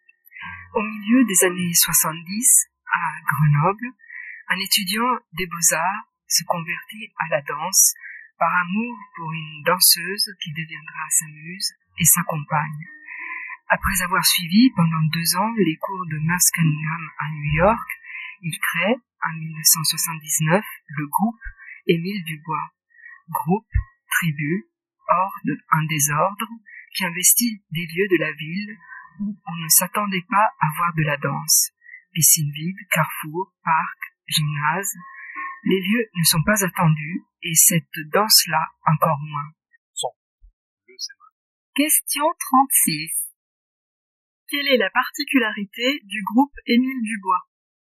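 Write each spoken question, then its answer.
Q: Quelle est la particularité du groupe Émile Dubois?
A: Il danse dans des lieux de la ville où on ne s'attend pas à voir de la danse (piscine vide, carrefour, parc, gymnase).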